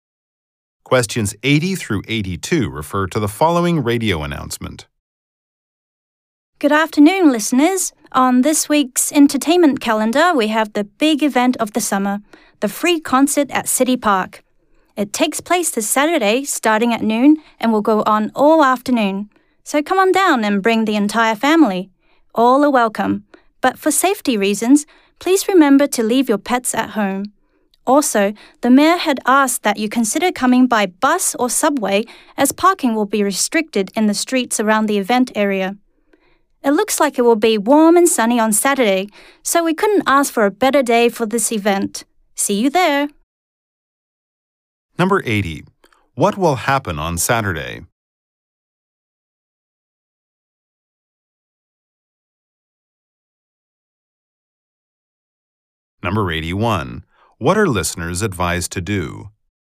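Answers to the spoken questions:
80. A free concert in City Park
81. Come by bus or subway and leave pets at home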